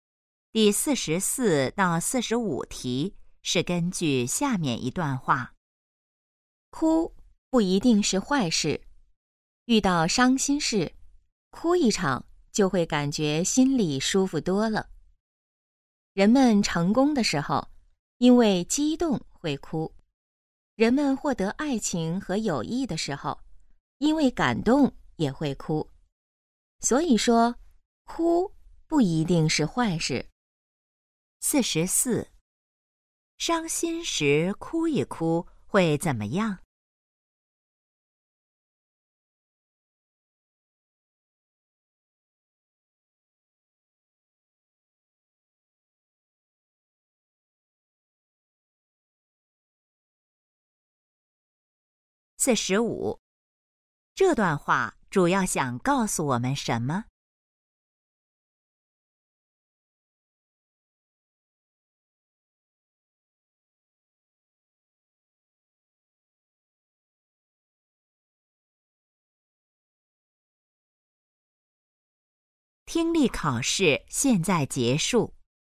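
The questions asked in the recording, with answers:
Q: 伤心时哭一哭会怎么样?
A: 心里会感觉舒服多了

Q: 这段话主要想告诉我们什么?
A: 哭不一定是坏事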